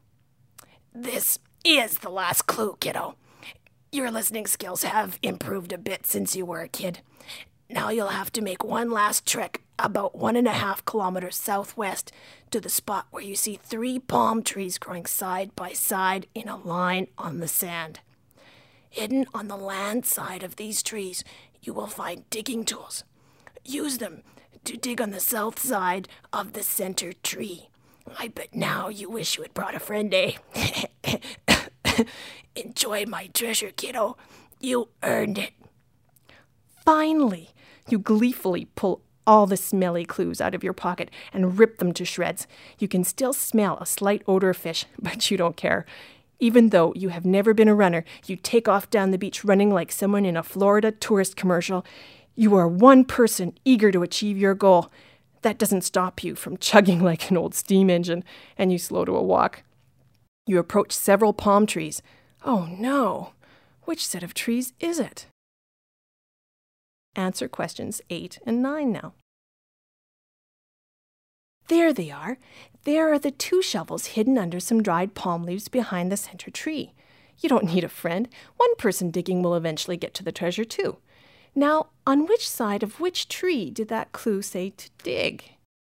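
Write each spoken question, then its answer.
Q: Now, on which side of which tree did that clue say to dig?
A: On the south side of the center tree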